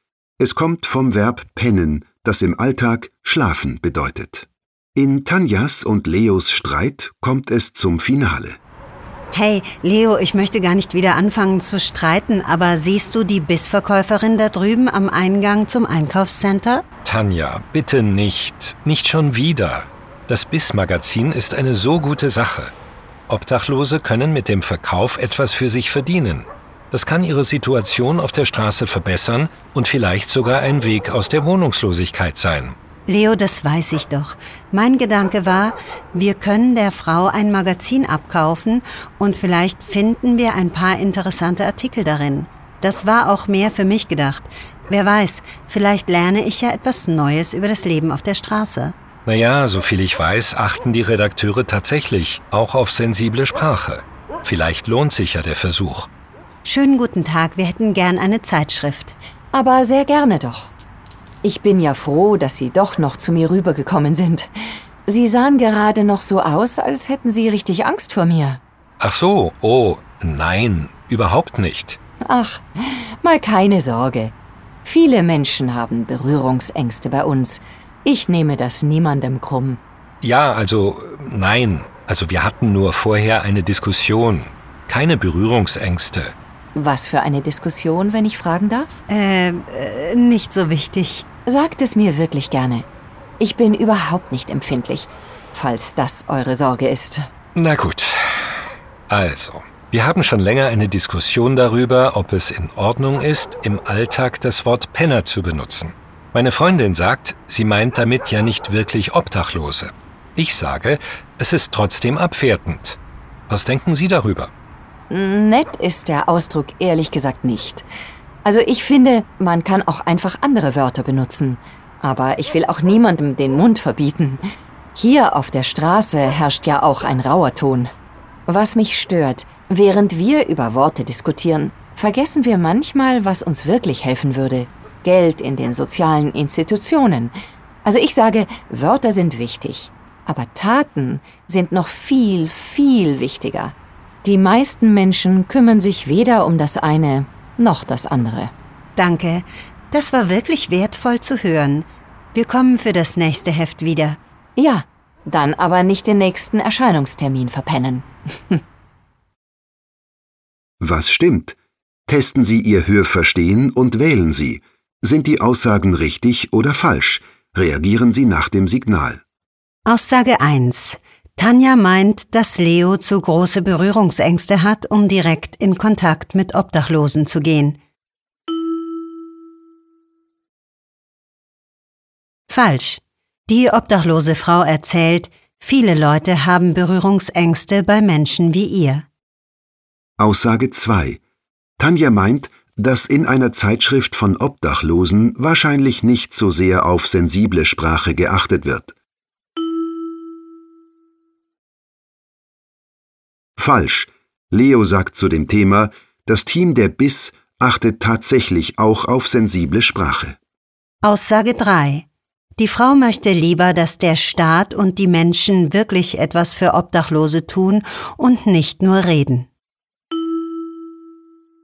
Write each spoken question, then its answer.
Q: Tanja meint, dass Leo zu große Berührungsängste hat, um direkt in Kontakt mit Obdachlosen zu gehen.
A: Falsch.

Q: Tanja meint, dass in einer Zeitschrift von Obdachlosen wahrscheinlich nicht so sehr auf sensible Sprache geachtet wird.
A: Falsch.

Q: Die Frau möchte lieber, dass der Staat und die Menschen wirklich etwas für Obdachlose tun und nicht nur reden.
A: Richtig.